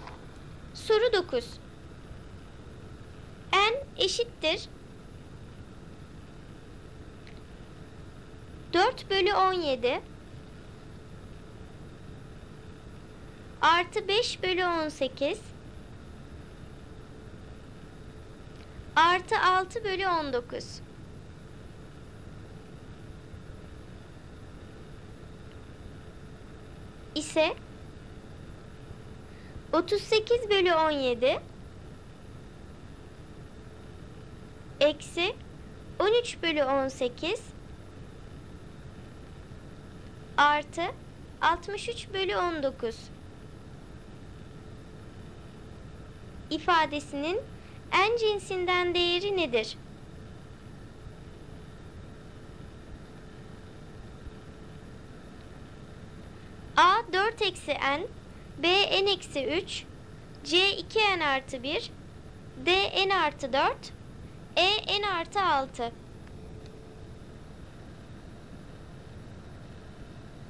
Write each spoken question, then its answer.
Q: artı 63 bölü 19 ifadesinin en cinsinden değeri nedir?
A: Doğru cevap D n artı 4.